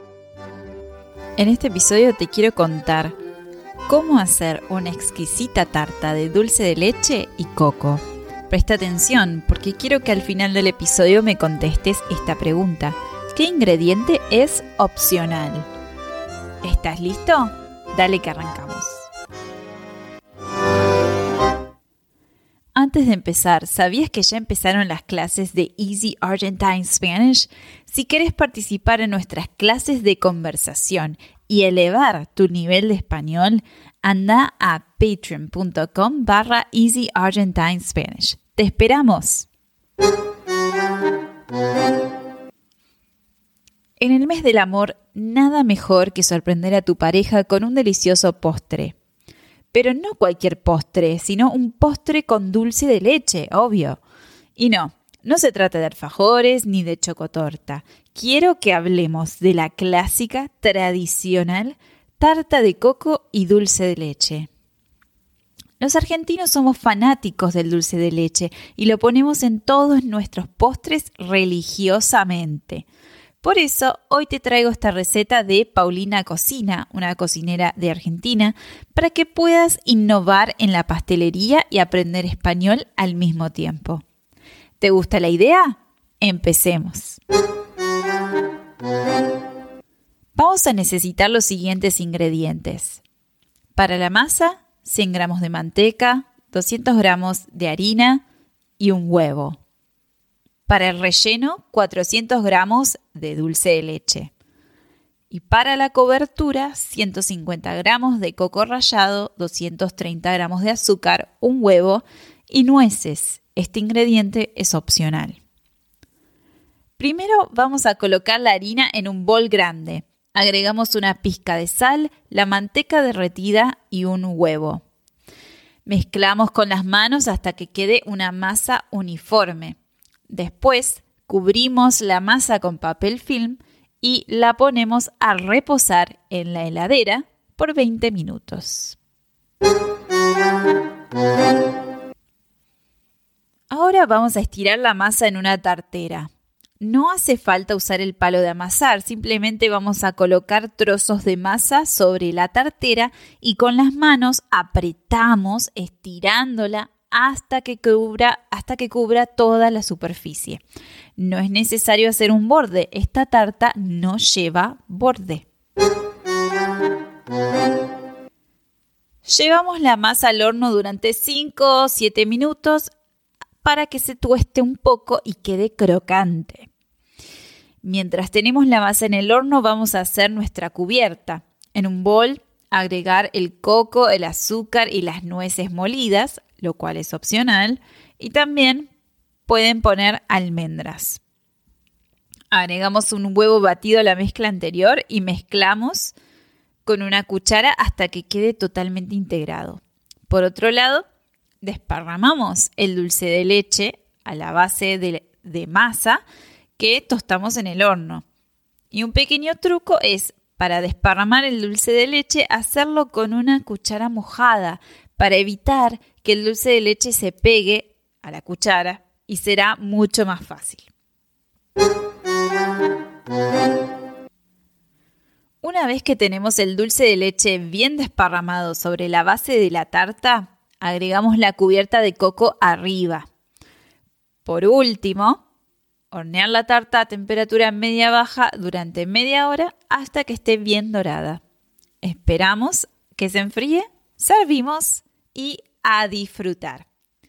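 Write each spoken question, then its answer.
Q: ¿Qué ingrediente es opcional?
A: Las nueces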